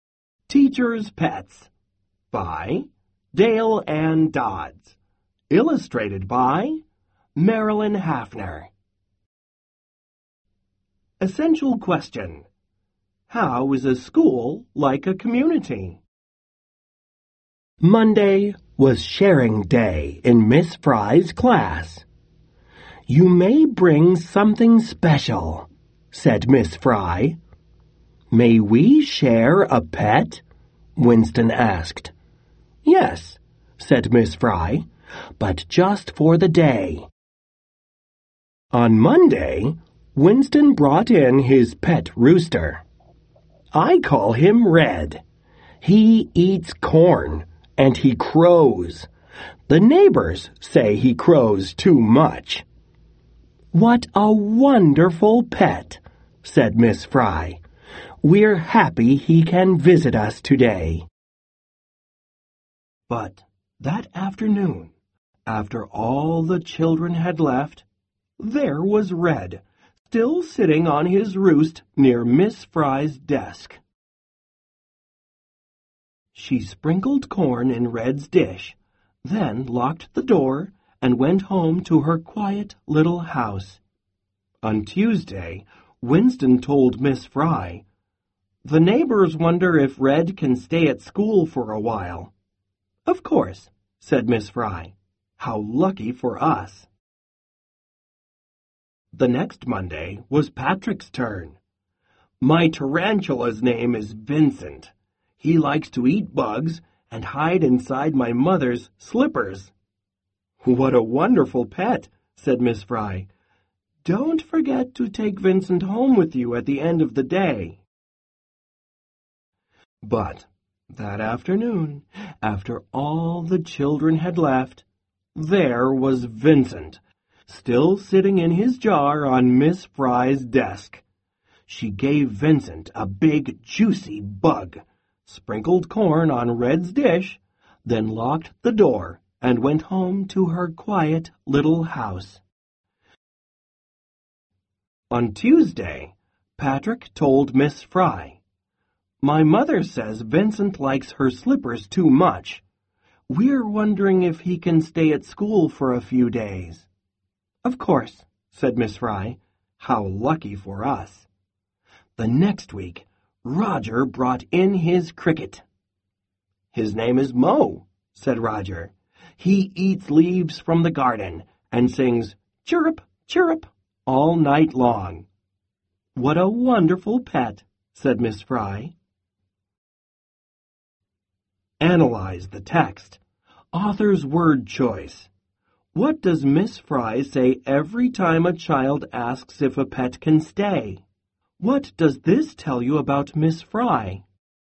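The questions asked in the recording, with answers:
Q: What does Miss Fry say every time a child asks if a pet can stay?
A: "Of course" and "How lucky for us."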